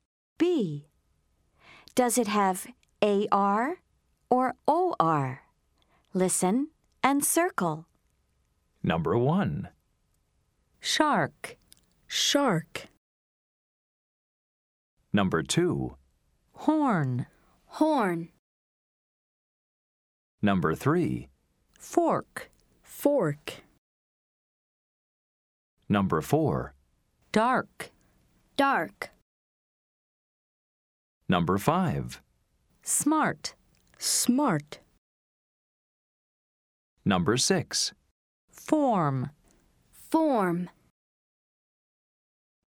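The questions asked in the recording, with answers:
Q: Does it have AR or OR?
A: AR (shark)

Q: Does it have AR or OR?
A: OR (horn)

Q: Does it have AR or OR?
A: OR (fork)

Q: Does it have AR or OR?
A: AR (dark)

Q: Does it have AR or OR?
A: AR (smart)

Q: Does it have AR or OR?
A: OR (form)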